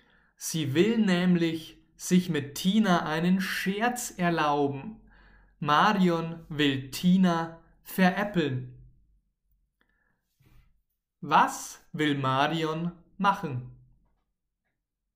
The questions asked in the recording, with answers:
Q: Was will Marion machen?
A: Sie will Tina veräppeln. Marion will Tina veräppeln.